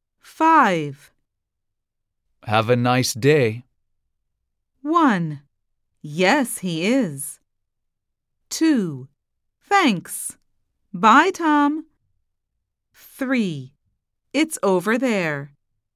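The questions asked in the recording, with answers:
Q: Have a nice day.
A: 2: Thanks.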